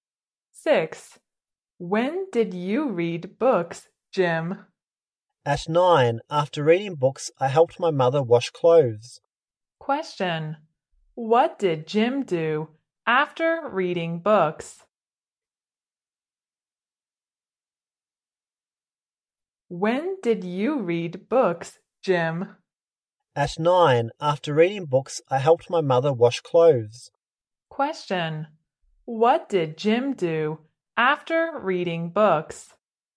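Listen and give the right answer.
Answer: He helped his mother wash clothes.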